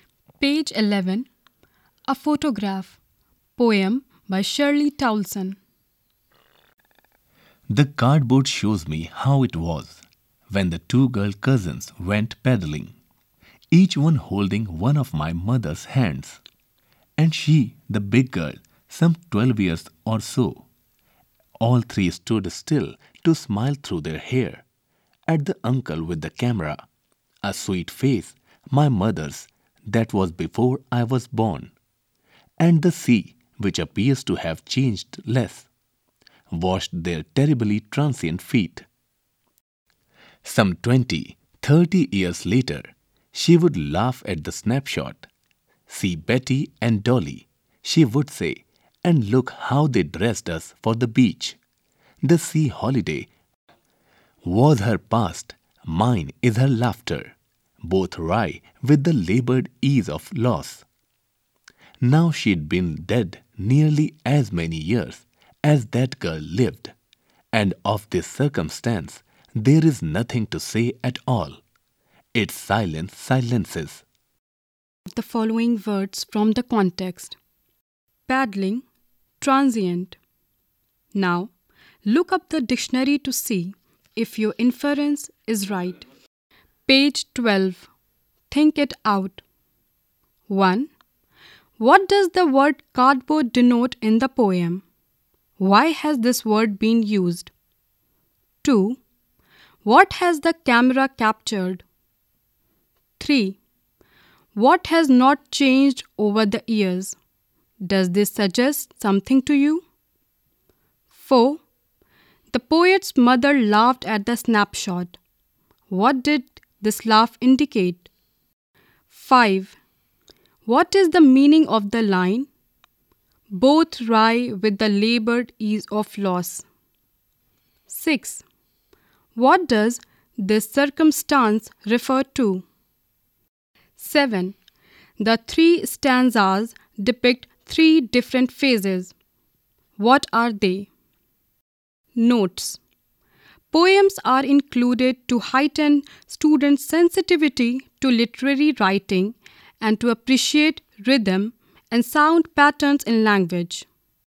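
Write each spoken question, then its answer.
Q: What does the word cardboard denote in the poem?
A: The photograph

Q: What has the camera captured?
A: The poet's mother, about 12, paddling at the beach with her two cousins, Betty and Dolly

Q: What has not changed over the years?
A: The sea

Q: What does this circumstance refer to?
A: The mother's death nearly as many years ago as the girl lived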